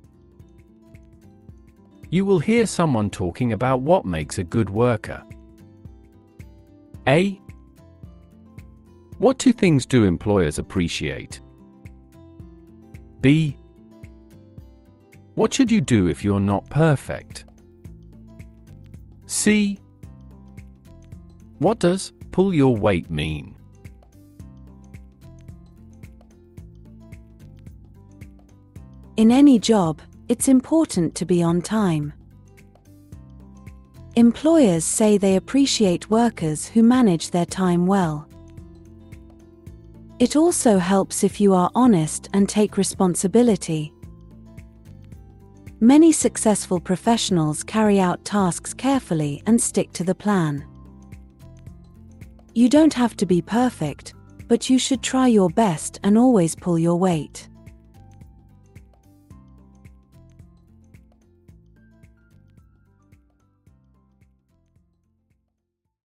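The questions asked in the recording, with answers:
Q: What should you do if you're not perfect?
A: Try your best and always pull your weight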